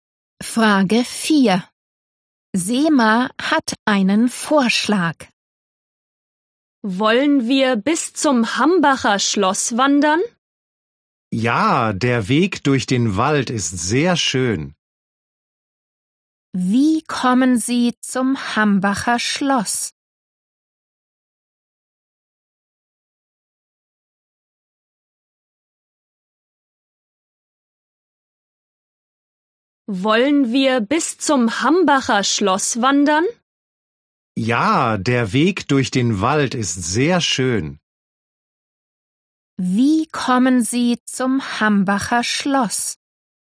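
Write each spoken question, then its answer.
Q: Wie kommen Sie zum Hambacher Schloss?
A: Zu Fuß (Wanderung durch den Wald)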